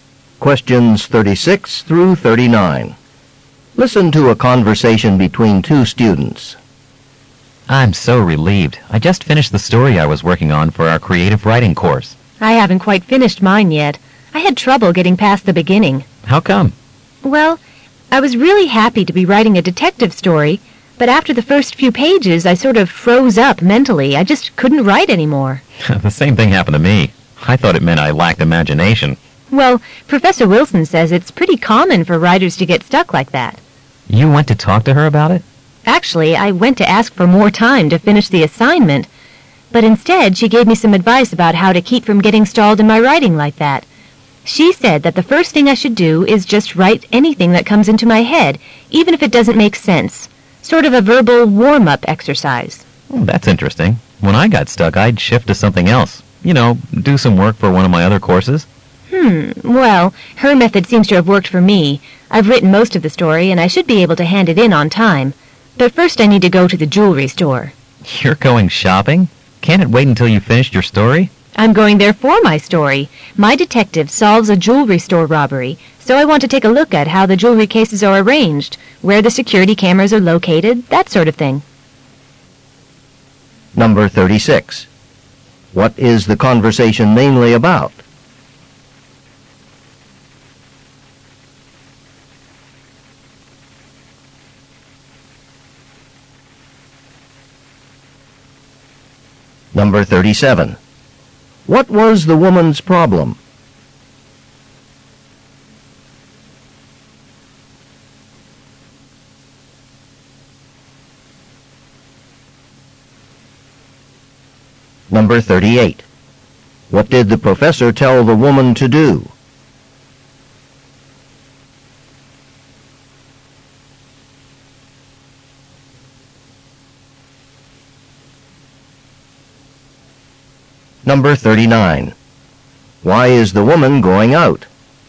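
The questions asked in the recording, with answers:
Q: What is the conversation mainly about?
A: Getting stuck while writing a story

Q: What was the woman's problem?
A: She couldn't continue writing her story.

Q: What did the professor tell the woman to do?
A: Write whatever comes into her head.

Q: Why is the woman going out?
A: To research a jewelry store for her story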